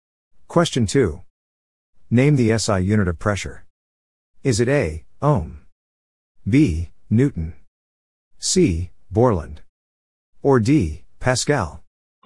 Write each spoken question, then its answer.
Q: Name the SI unit of pressure.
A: The answer is D. Pascal.